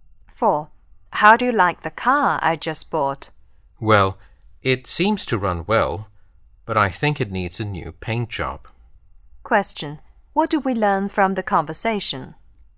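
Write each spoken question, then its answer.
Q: What do we learn from the conversation?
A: The car runs well but needs a new paint job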